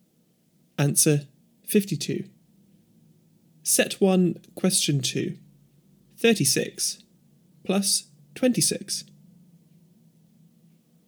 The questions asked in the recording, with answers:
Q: 36 plus 26.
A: Answer 62.